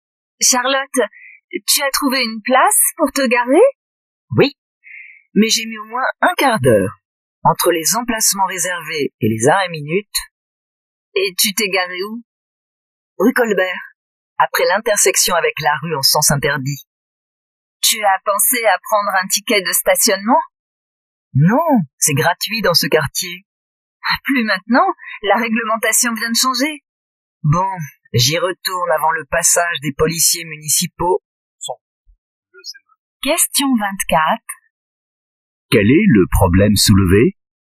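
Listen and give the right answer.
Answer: Charlotte n'a pas pris de ticket de stationnement alors que le stationnement est désormais payant dans ce quartier.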